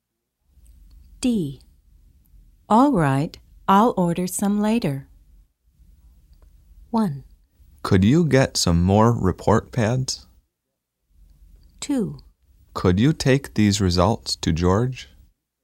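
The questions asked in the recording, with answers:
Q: All right, I'll order some later.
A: 1: Could you get some more report pads?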